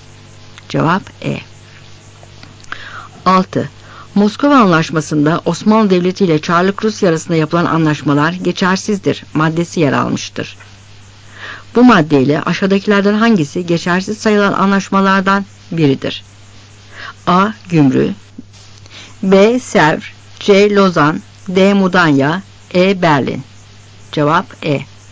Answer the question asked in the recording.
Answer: Cevap E.